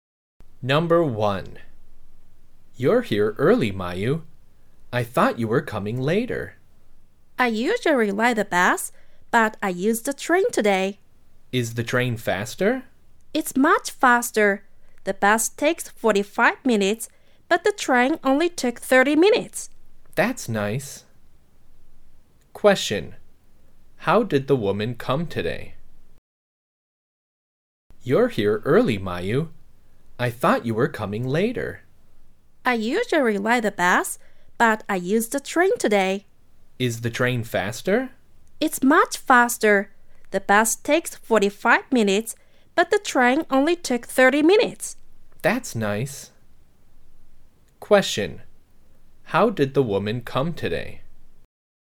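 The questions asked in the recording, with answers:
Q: How did the woman come today?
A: By train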